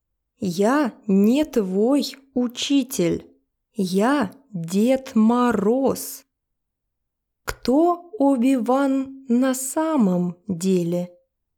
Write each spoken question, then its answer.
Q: Кто Оби-Ван на самом деле?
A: Дед Мороз, русский волшебник.